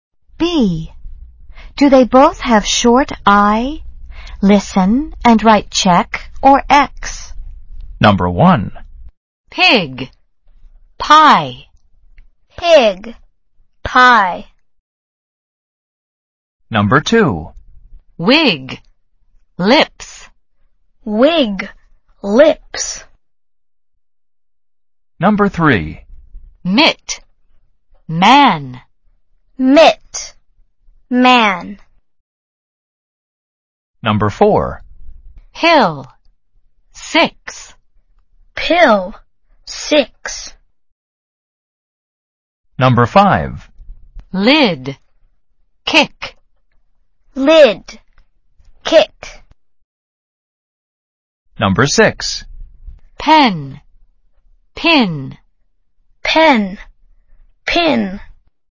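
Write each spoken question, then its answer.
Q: Wig. Lips.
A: check (yes)

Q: Mitt. Man.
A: X (no)

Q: Hill. Six.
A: check (yes)

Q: Lid. Kick.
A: check (yes)

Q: Pen. Pin.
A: X (no)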